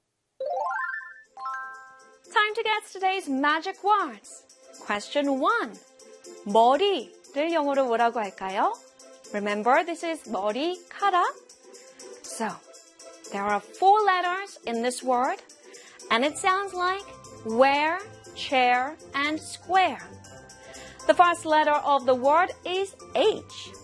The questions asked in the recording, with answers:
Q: 머리를 영어로 뭐라고 할까요?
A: 머리 in English is, of course, H-A-I-R, hair.